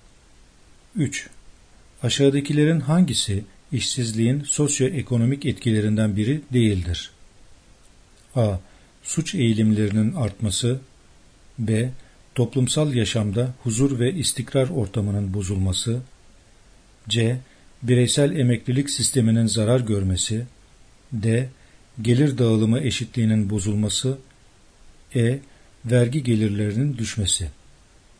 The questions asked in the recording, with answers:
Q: Aşağıdakilerin hangisi işsizliğin sosyoekonomik etkilerinden biri değildir?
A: Yanıt C. Bireysel emeklilik sisteminin zarar görmesi.